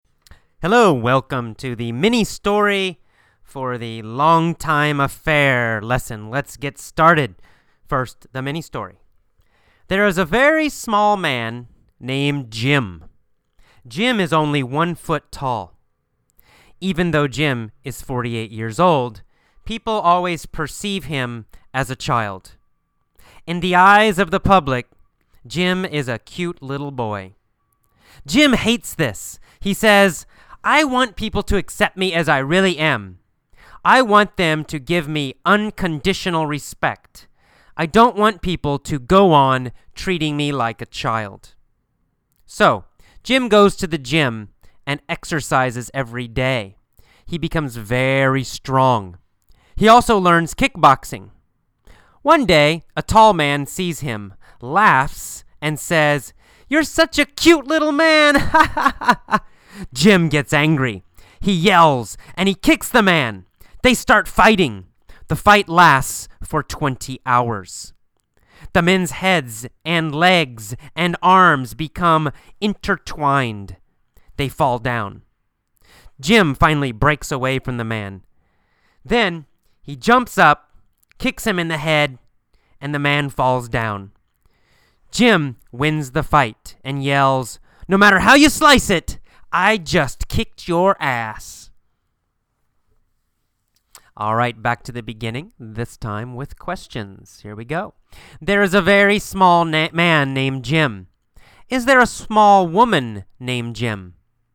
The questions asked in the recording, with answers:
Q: Is there a small woman named Jim?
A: No, there's not a small woman named Jim.